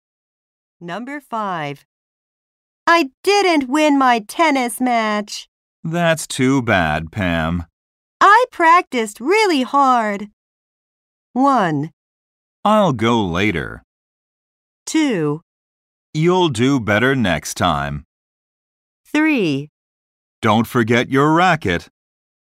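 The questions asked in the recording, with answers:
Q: I practiced really hard.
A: 2: You'll do better next time.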